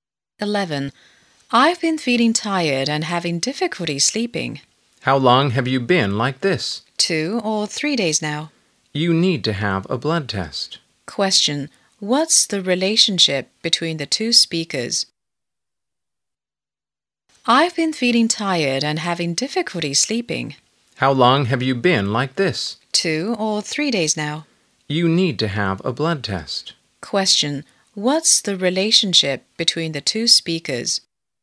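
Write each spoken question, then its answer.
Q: What's the relationship between the two speakers?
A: Doctor and patient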